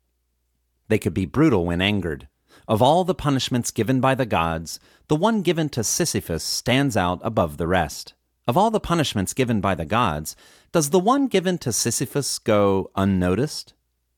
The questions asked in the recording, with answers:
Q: Of all the punishments given by the gods, does the one given to Sisyphus go unnoticed?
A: No, of all the punishments given by the gods, the one given to Sisyphus does not go unnoticed.